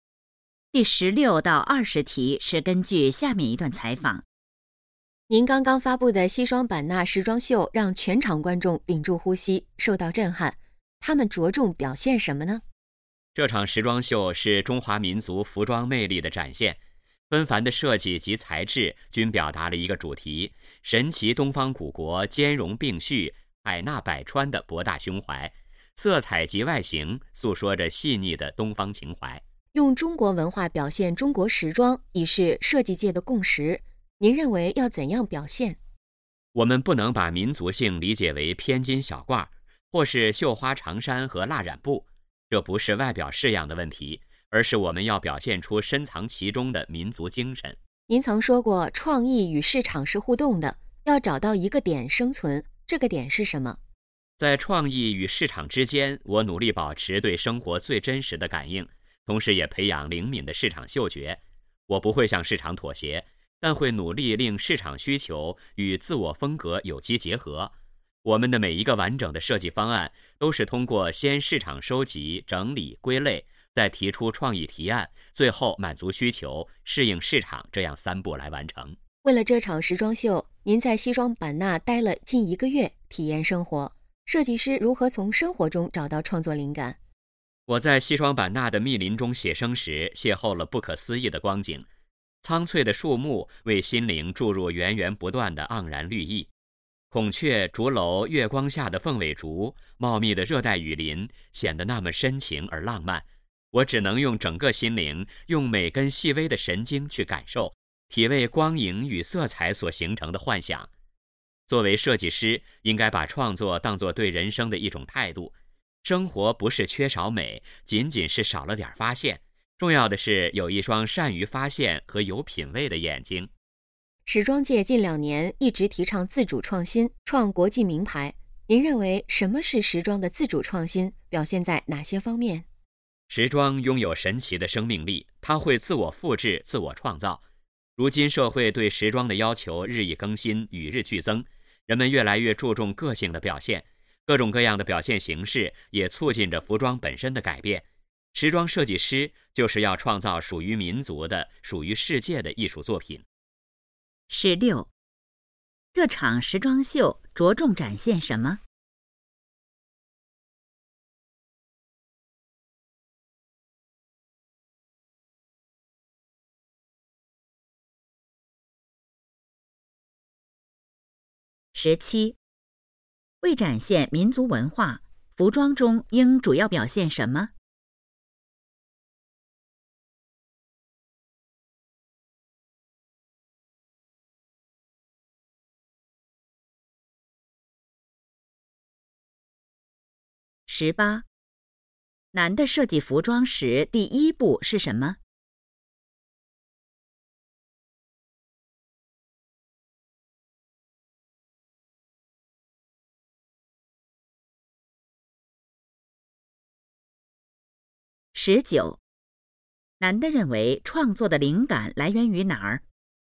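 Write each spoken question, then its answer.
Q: 这场时装秀着重展现什么?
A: 中华民族服装的魅力

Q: 为展现民族文化,服装中应主要表现什么?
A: 深藏其中的民族精神

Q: 男的设计服装时第一步是什么?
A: 市场收集

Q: 男的认为创作的灵感来源于哪儿?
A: 生活(善于发现生活中的美)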